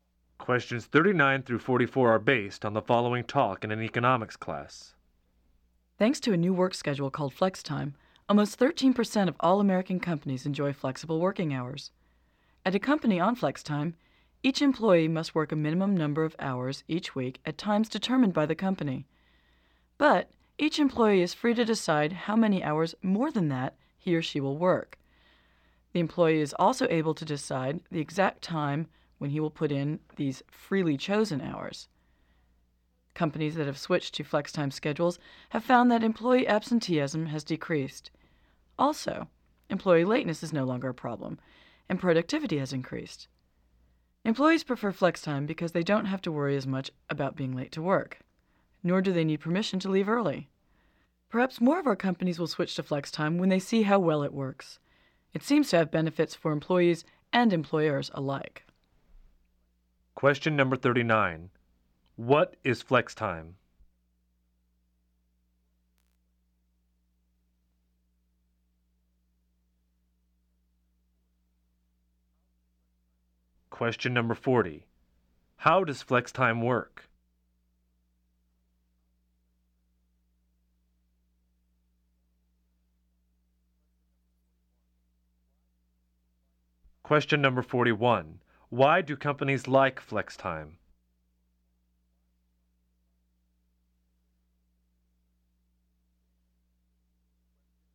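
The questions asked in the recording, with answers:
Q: What is flex time?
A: A work schedule with flexible working hours

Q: How does flex time work?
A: Employees work a required minimum of hours at set times and choose how many extra hours to work and when

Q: Why do companies like flex time?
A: Absenteeism and lateness decrease and productivity increases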